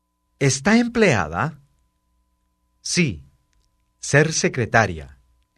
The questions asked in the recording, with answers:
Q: ¿Está empleada? Sí, ser secretaria.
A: Sí, soy secretaria.